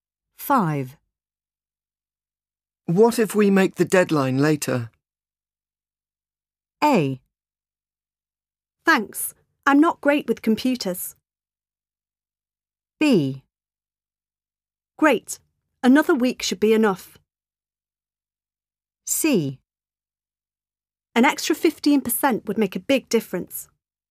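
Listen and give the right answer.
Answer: B: Great. Another week should be enough.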